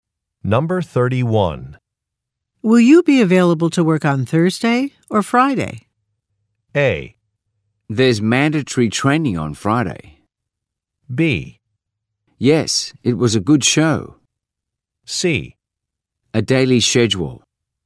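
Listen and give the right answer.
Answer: A: There's mandatory training on Friday.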